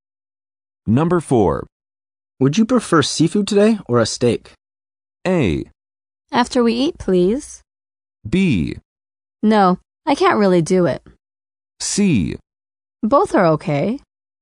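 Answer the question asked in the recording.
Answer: C: Both are okay.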